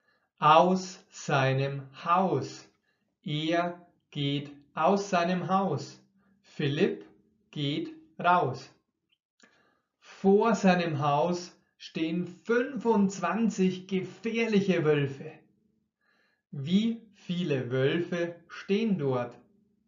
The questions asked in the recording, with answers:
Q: Wie viele Wölfe stehen dort?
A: 25. Dort stehen 25 Wölfe.